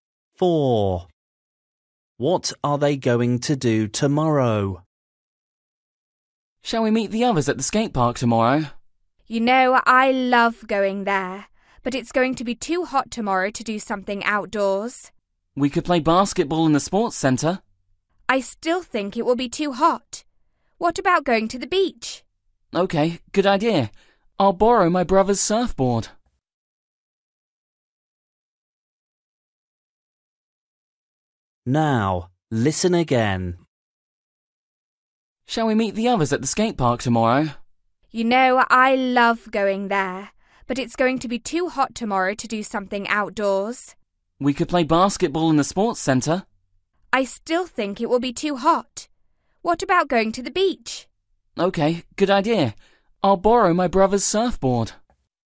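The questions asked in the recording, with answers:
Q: What are they going to do tomorrow?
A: Go to the beach (surfing)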